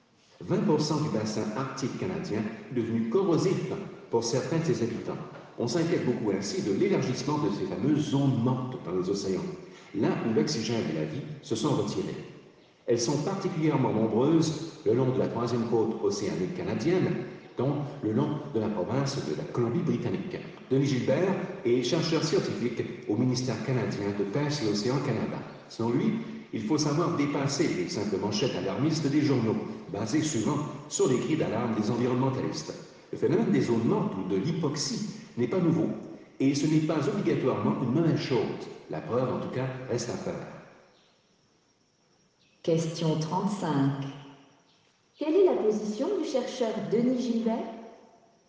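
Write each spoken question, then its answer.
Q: Quelle est la position du chercheur Denis Gilbert?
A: Il est nuancé : il faut dépasser les manchettes alarmistes, car les zones mortes (l'hypoxie) ne sont pas un phénomène nouveau ni forcément une mauvaise chose.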